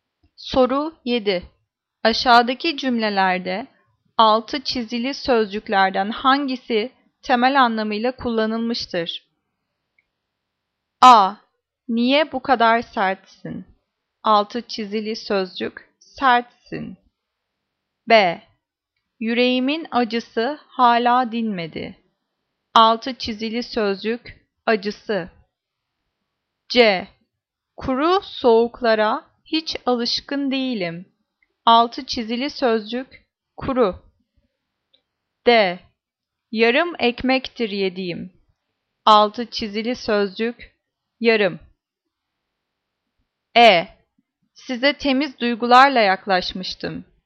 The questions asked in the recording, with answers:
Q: Aşağıdaki cümlelerde 6 çizili sözcüklerden hangisi temel anlamıyla kullanılmıştır?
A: Cevap D. Yarım ekmektir yediğim.